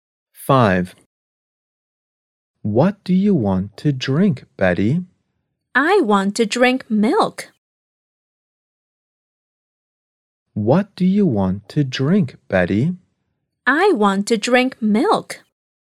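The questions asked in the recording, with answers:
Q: What do you want to drink, Betty?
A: Milk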